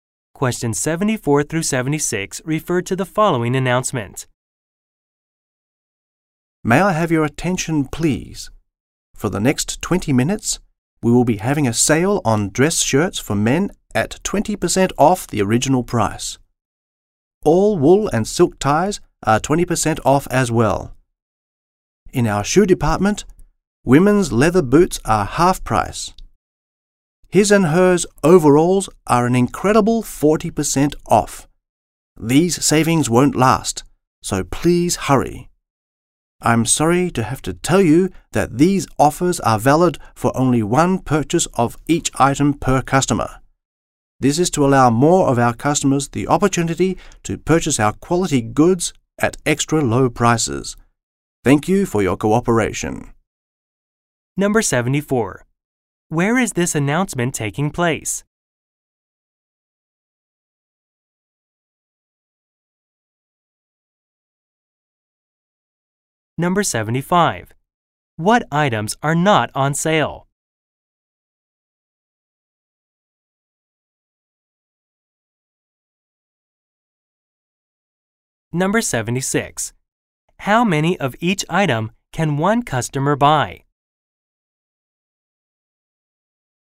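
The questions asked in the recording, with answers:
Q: Where is this announcement taking place?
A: In a clothing/department store

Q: How many of each item can one customer buy?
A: One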